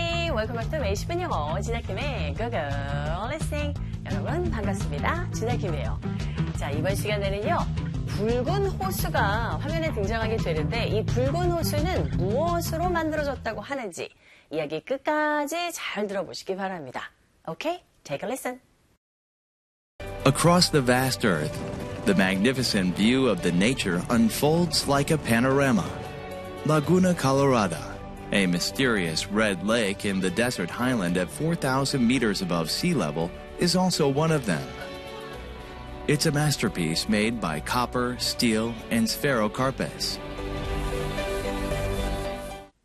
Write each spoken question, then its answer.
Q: 이 붉은 호수는 무엇으로 만들어졌다고 하는지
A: 바로 이 붉은 호수는요, 구리와 철과 이끼리로 만들어졌다고 합니다.